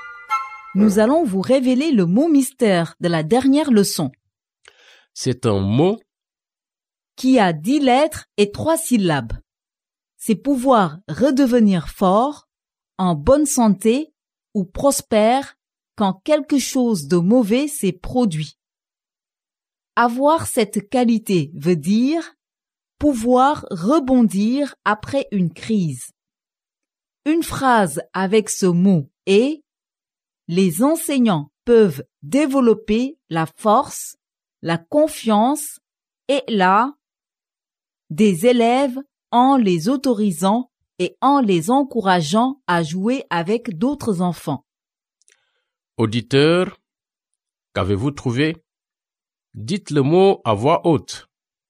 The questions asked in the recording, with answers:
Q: Auditeur, qu'avez-vous trouvé?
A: Le mot mystère d'aujourd'hui est résilience.